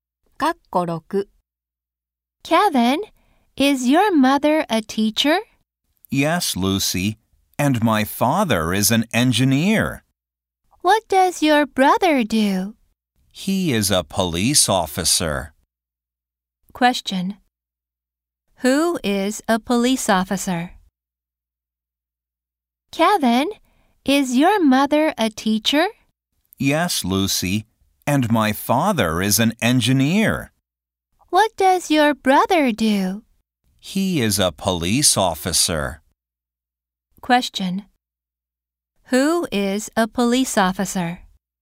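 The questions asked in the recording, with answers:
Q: Who is a police officer?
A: Kevin's brother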